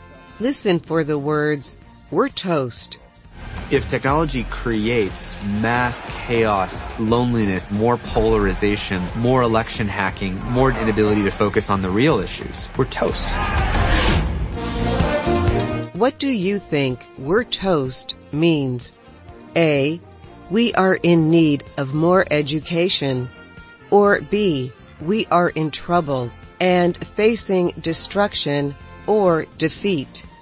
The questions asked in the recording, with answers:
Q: What do you think "we're toast" means?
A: The answer is B. We're toast means we are in trouble and facing destruction or defeat.